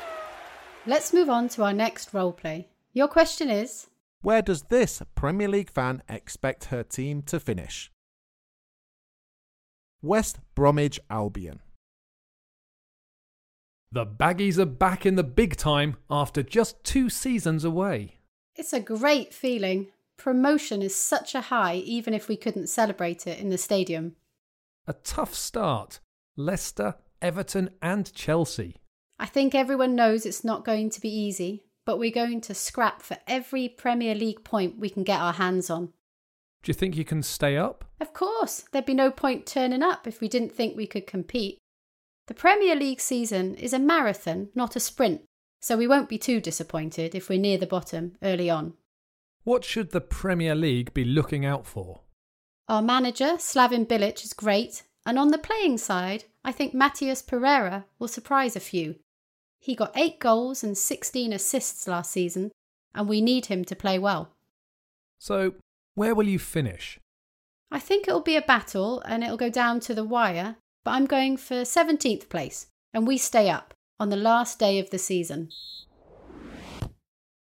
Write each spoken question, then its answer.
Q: where does this Premier League fan expect her team to finish?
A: The answer is 17th and safe from relegation, although she expects it to be a hard season.